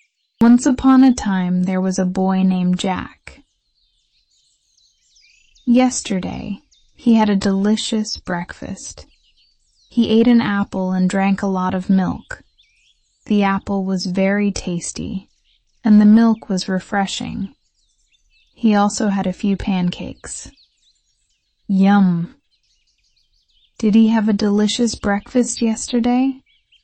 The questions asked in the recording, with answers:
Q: Did he have a delicious breakfast yesterday?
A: Yes, he did.